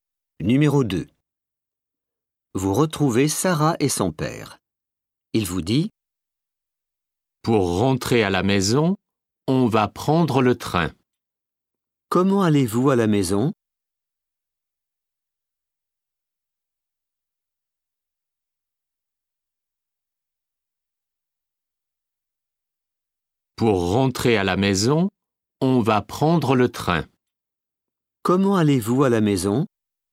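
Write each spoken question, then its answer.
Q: Comment allez-vous à la maison?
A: En train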